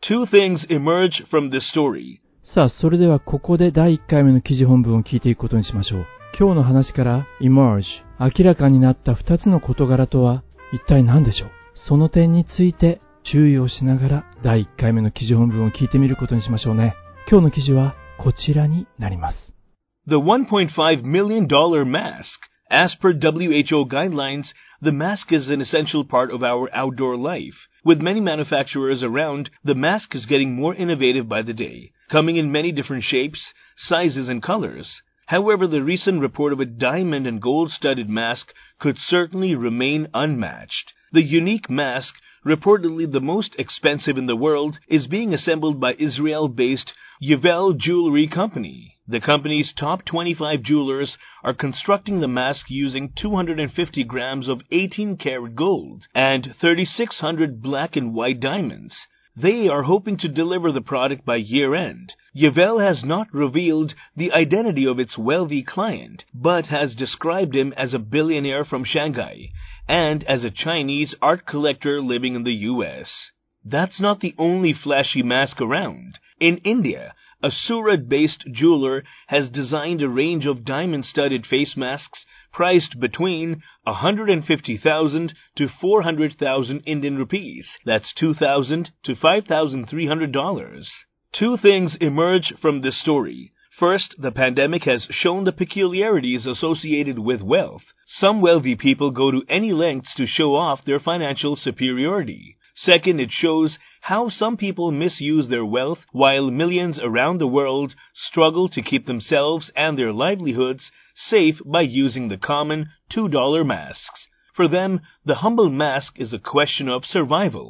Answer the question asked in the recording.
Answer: First, the pandemic has shown the peculiarities associated with wealth.